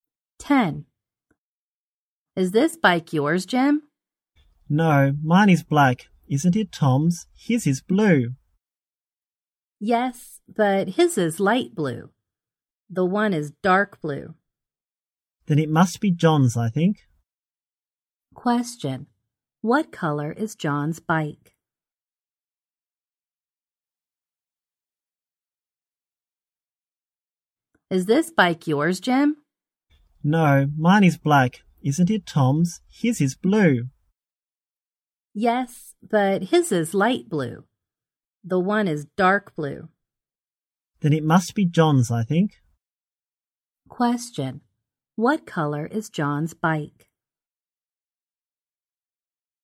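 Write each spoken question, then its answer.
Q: What color is John's bike?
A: Dark blue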